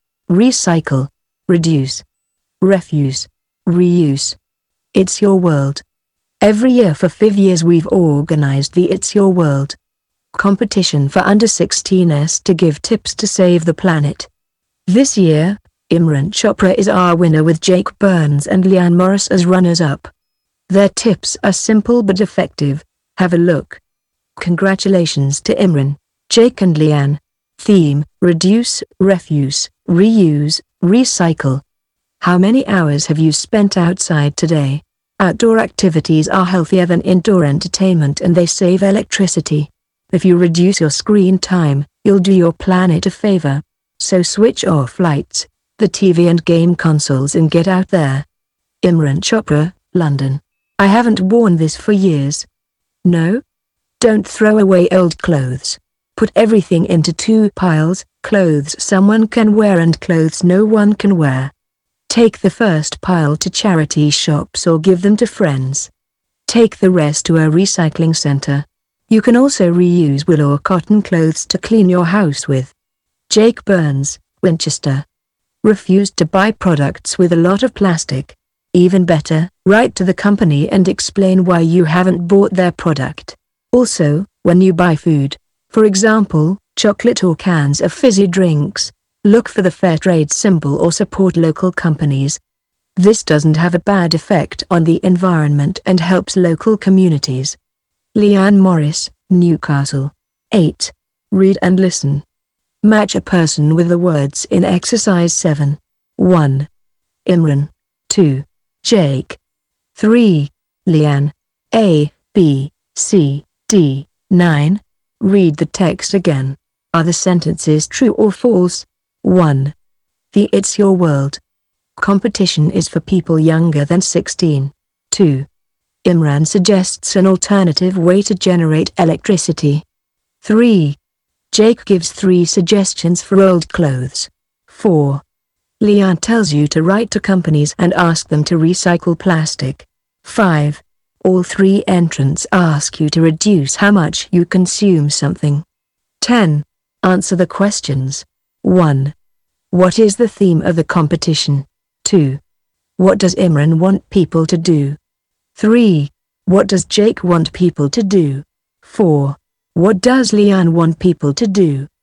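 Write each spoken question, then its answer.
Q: The It's Your World competition is for people younger than 16.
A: True

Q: Imran suggests an alternative way to generate electricity.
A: False

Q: Jake gives 3 suggestions for old clothes.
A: True

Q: Leanne tells you to write to companies and ask them to recycle plastic.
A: False

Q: What is the theme of the competition?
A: Reduce, Refuse, Reuse, Recycle

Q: What does Imran want people to do?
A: Reduce screen time, switch things off and go outside

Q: What does Jake want people to do?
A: Not throw away old clothes: give them to charity shops or friends, recycle or reuse them

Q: What does Leanne want people to do?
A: Refuse to buy products with a lot of plastic, and buy fair trade or local products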